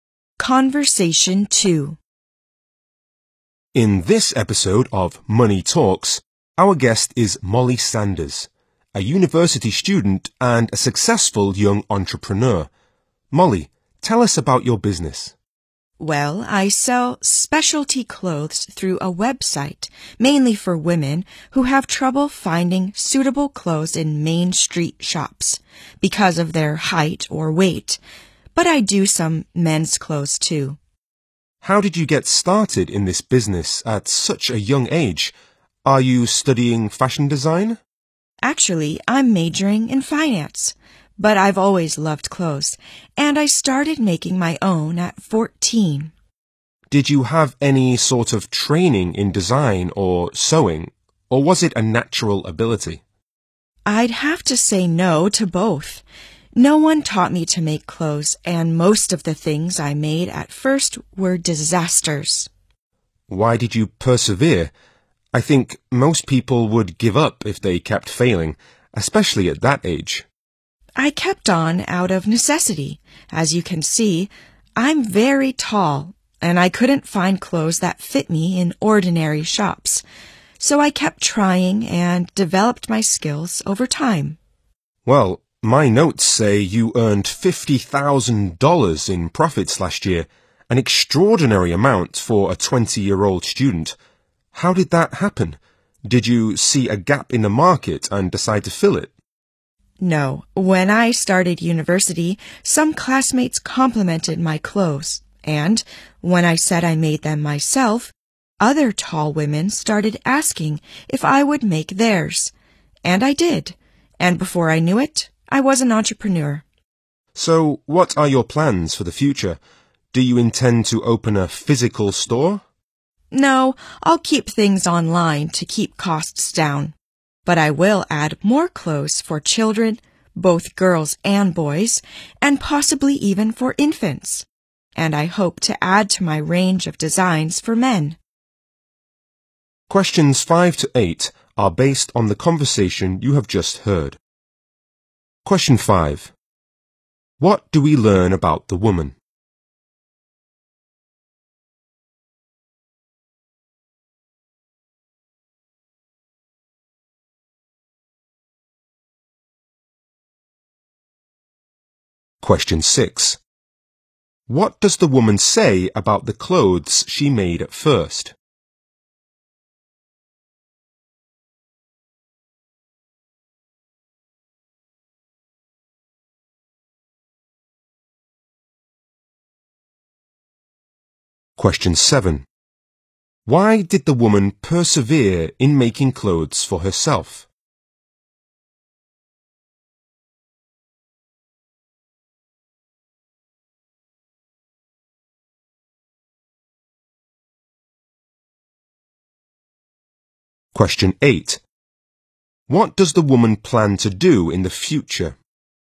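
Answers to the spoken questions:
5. She is a university student majoring in finance and a successful young entrepreneur who sells specialty clothes online.
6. Most of them were disasters.
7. She is very tall and couldn't find clothes that fit in ordinary shops.
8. Stay online and add clothes for children, possibly infants, and more designs for men.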